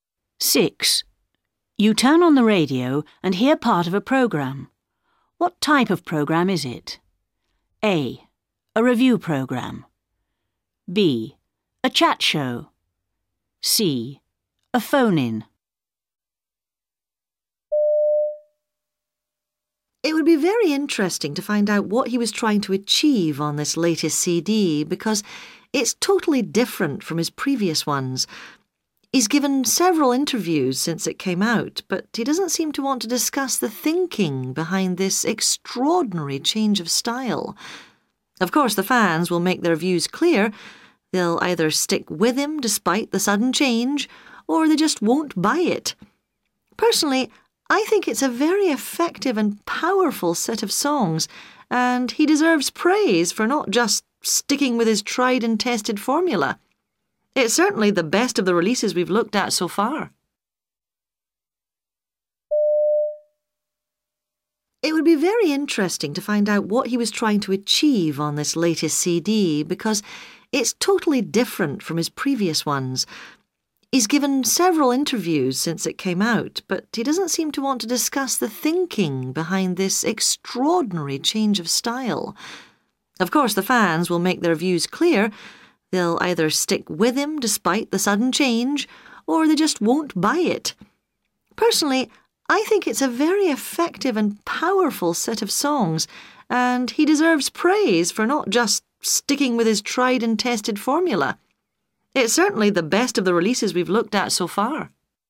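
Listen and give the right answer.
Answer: A: A review program.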